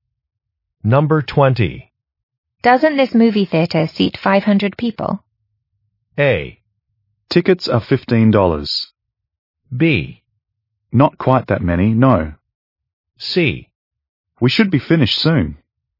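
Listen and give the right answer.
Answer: B: Not quite that many, no.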